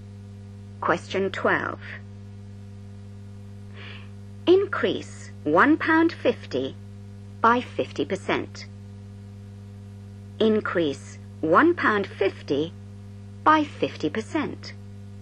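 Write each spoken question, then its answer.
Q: Increase £1.50 by 50%.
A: £2.25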